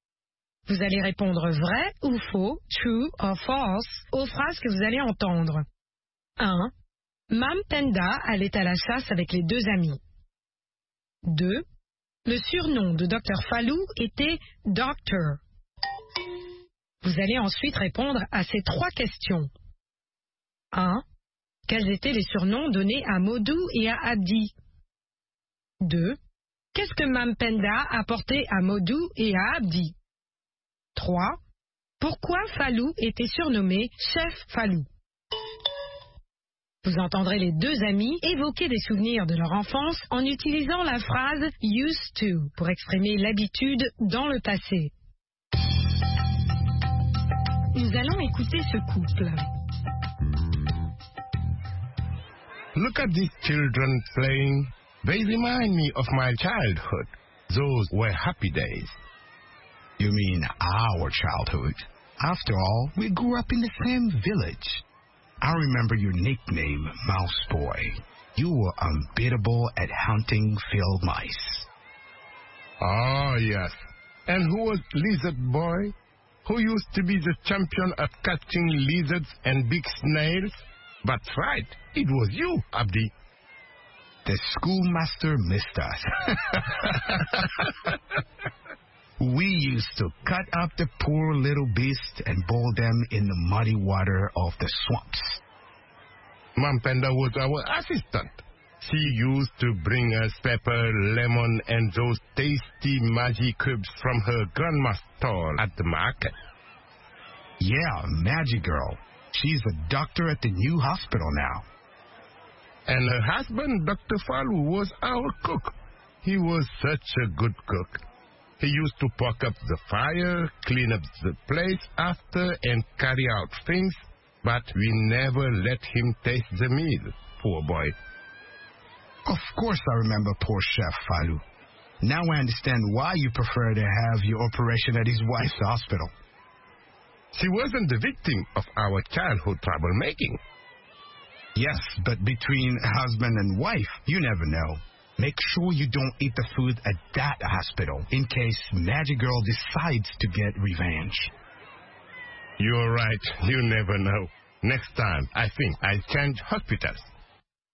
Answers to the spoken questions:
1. L'énoncé 1 est faux.
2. L'énoncé 2 est faux.
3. Mice Boy et Lizard Boy.
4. Mam Penda apportait aux deux amis du poivre, du citron et des cubes Maggi.
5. Parce qu'il leur faisait la cuisine.